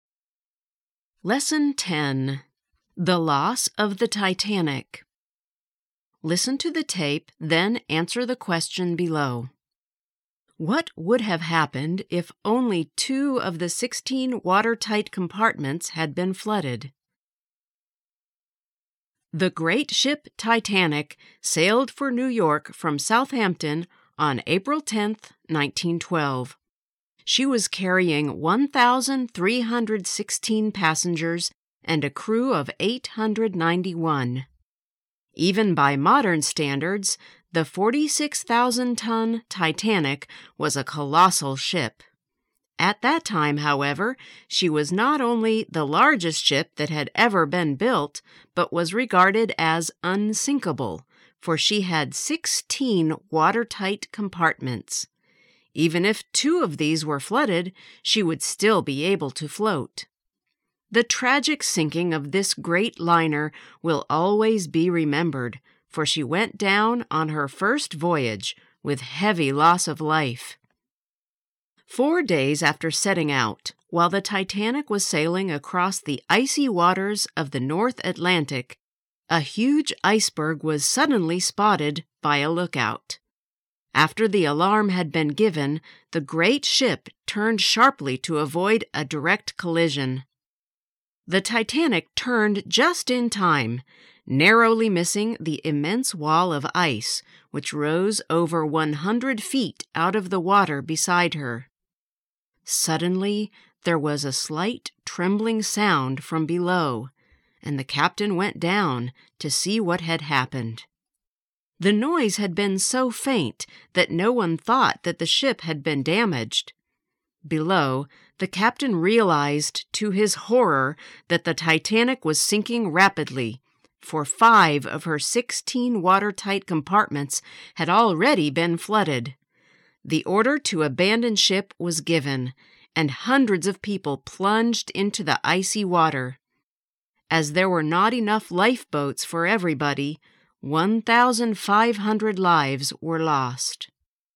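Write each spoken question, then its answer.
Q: What would have happened if only 2 of the 16 watertight compartments had been flooded?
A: She would still have been able to float.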